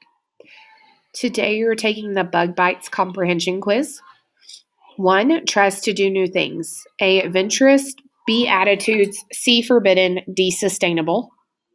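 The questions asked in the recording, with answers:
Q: tries to do new things.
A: A: adventurous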